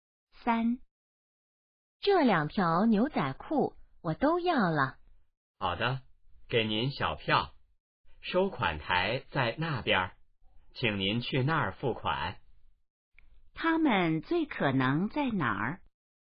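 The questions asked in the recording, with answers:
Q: 他们最可能在哪儿?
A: 商场(服装店)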